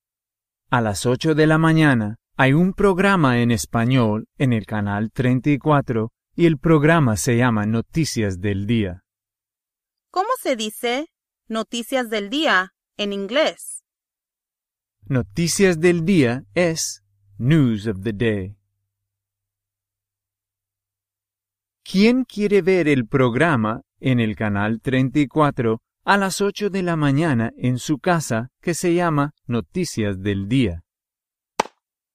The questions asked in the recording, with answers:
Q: ¿Quién quiere ver el programa en el canal 34 a las 8 de la mañana en su casa que se llama Noticias del Día?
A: Anna.